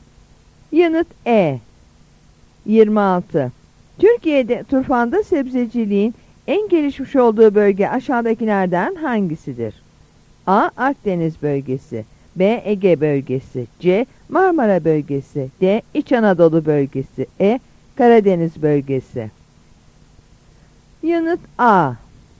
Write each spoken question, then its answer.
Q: Türkiye'de turfanda sebzeciliğin en gelişmiş olduğu bölge aşağıdakilerden hangisidir?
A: Yanıt A.